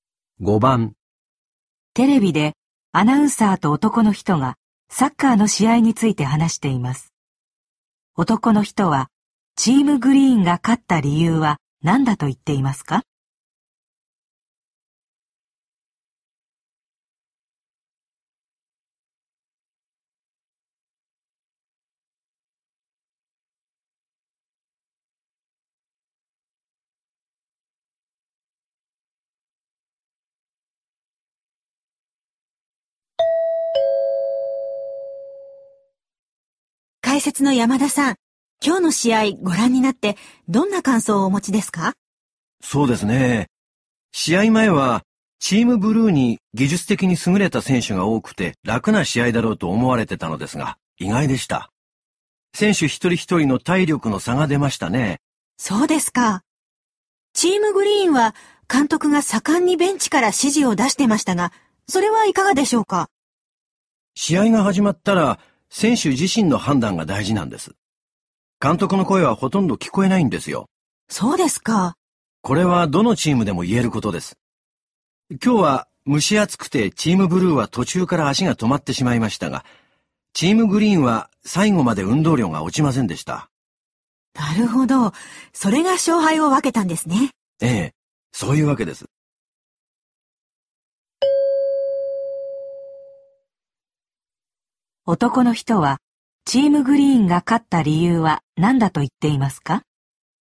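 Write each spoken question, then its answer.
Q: 男の人は、チームグリーンが勝った理由は何だと言っていますか?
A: 最後まで運動量が落ちなかった(体力の差)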